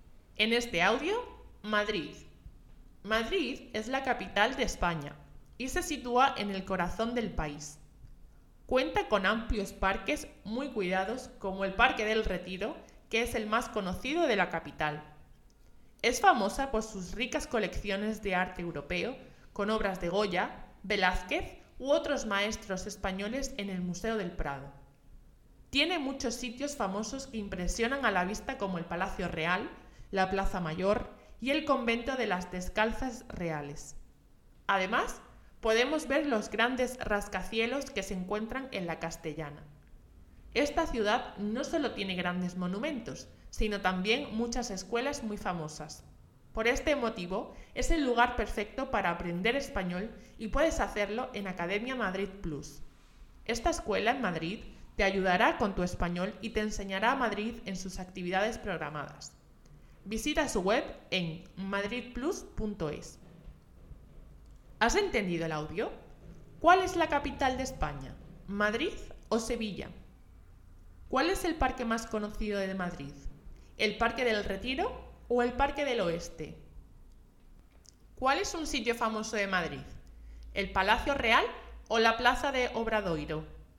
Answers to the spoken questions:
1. Madrid
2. Parque del Retiro
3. Palacio Real